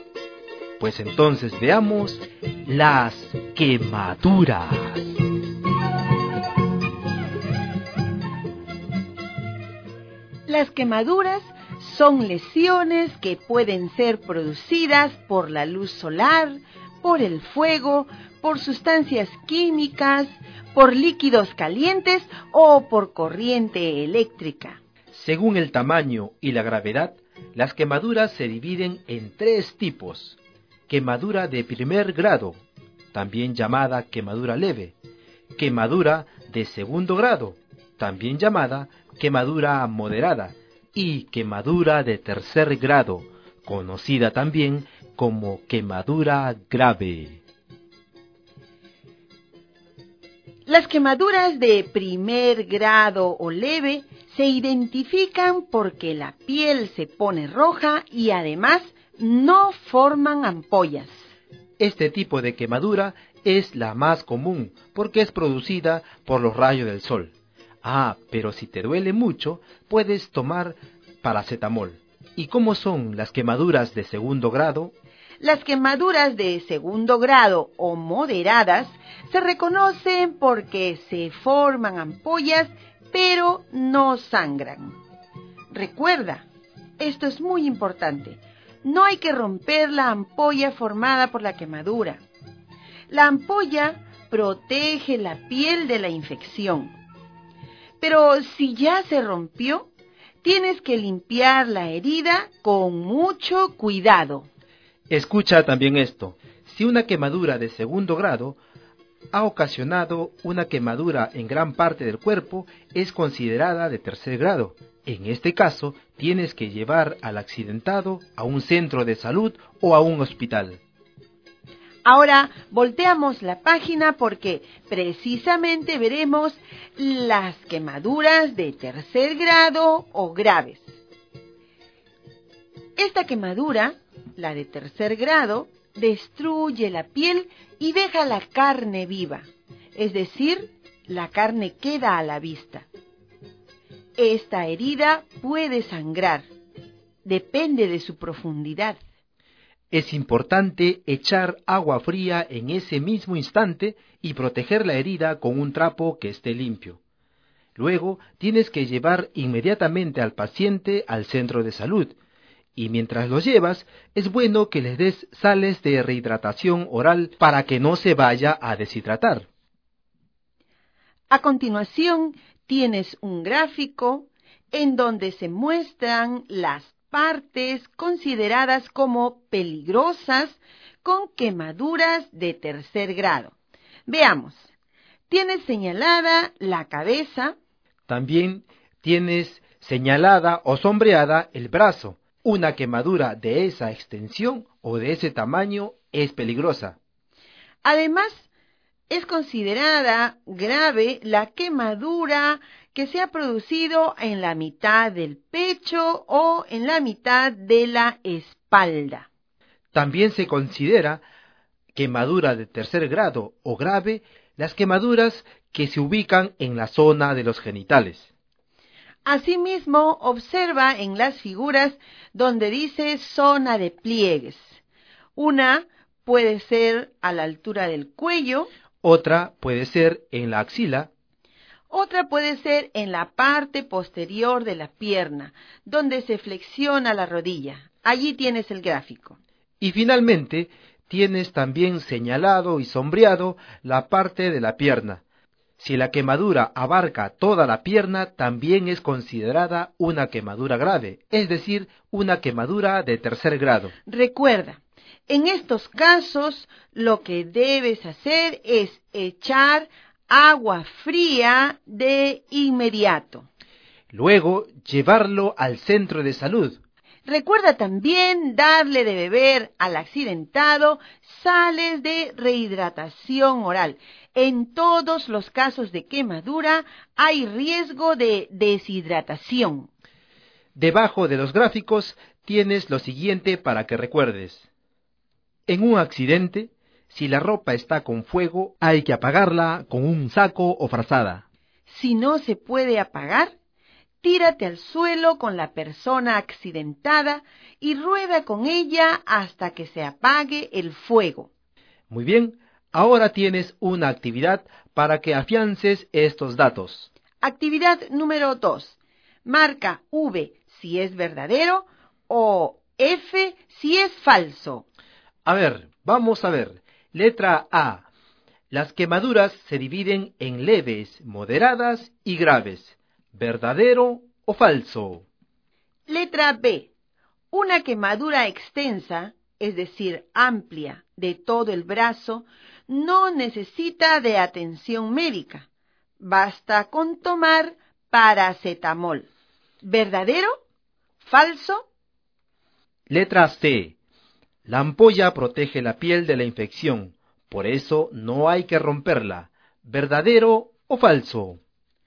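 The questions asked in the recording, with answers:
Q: Las quemaduras se dividen en leves, moderadas y graves. ¿Verdadero o falso?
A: Verdadero

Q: Una quemadura extensa, es decir, amplia, de todo el brazo, no necesita de atención médica. Basta con tomar paracetamol. ¿Verdadero? ¿Falso?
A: Falso

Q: La ampolla protege la piel de la infección, por eso no hay que romperla. ¿Verdadero o falso?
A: Verdadero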